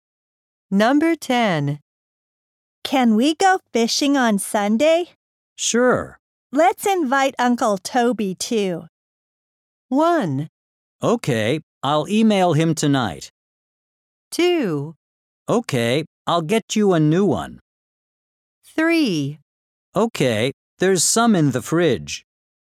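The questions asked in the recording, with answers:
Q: Let's invite Uncle Toby, too.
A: 1: Okay, I'll email him tonight.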